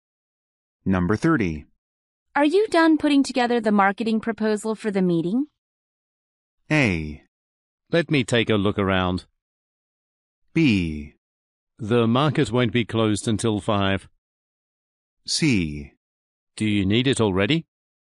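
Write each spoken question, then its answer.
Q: Are you done putting together the marketing proposal for the meeting?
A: C: Do you need it already?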